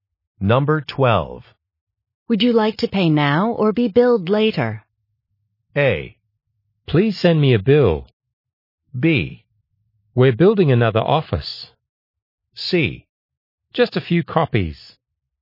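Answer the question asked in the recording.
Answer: A: Please send me a bill.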